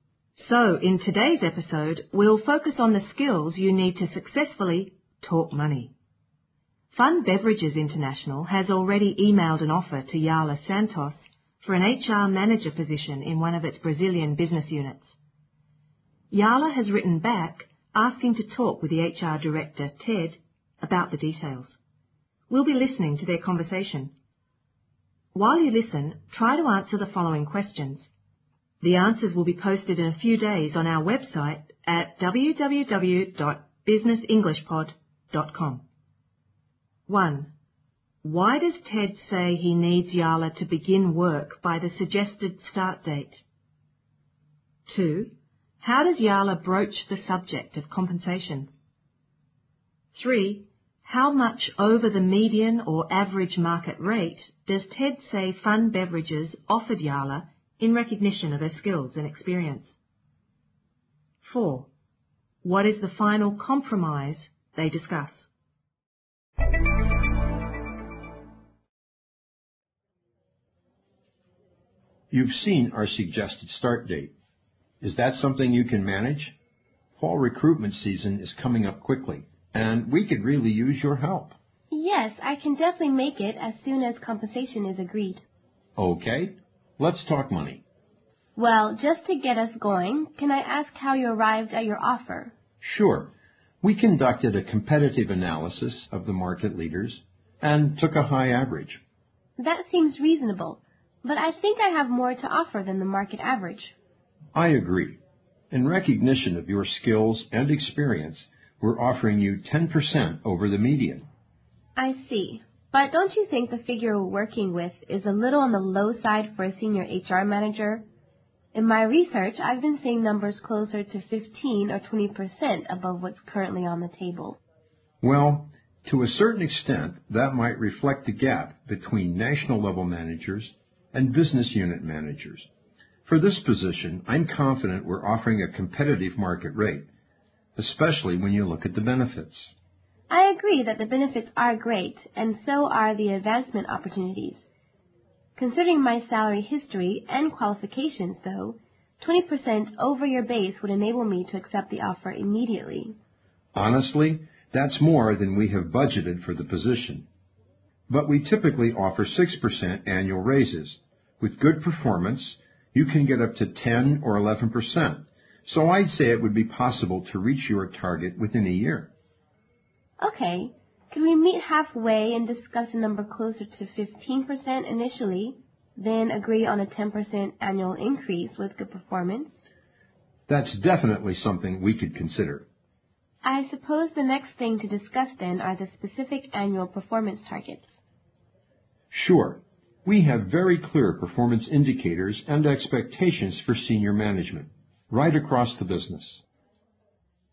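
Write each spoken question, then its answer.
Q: Why does Ted say he needs Yala to begin work by the suggested start date?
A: Fall recruitment season is coming up quickly and they need her help

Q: How does Yala broach the subject of compensation?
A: She says she can start as soon as compensation is agreed, then asks how Ted arrived at his offer

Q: How much over the median or average market rate does Ted say Fun Beverages offered Yala in recognition of her skills and experience?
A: He says that they are already offering her 10% more than the median or average.

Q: What is the final compromise they discuss?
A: About 15% over the base at first, then a 10% yearly raise with good performance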